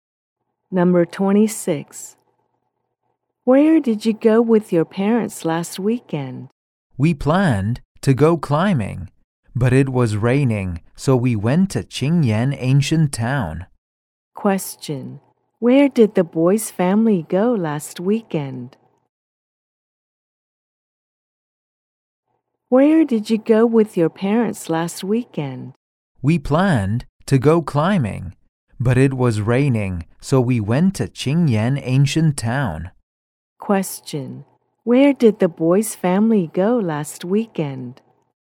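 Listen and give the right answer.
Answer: Qingyan Ancient Town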